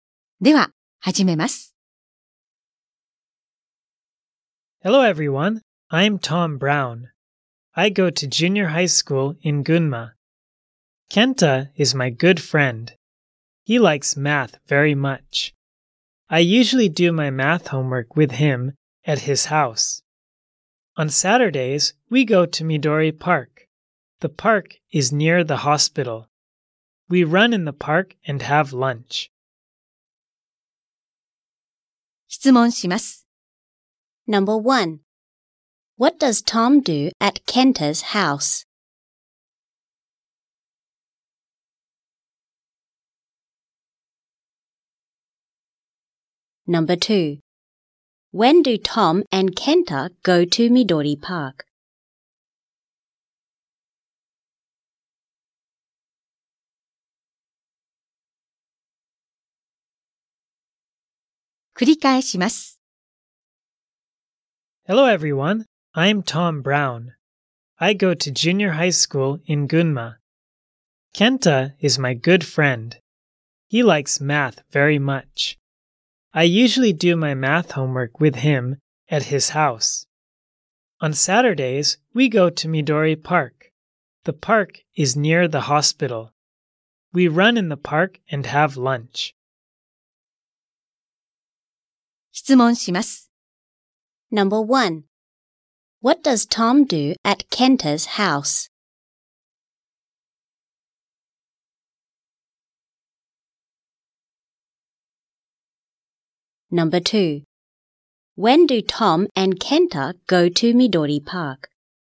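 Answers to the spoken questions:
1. He does his math homework with Kenta.
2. On Saturdays.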